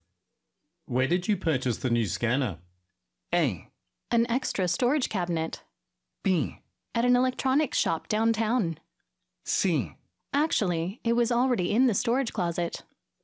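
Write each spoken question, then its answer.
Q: Where did you purchase the new scanner?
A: B: At an electronics shop downtown.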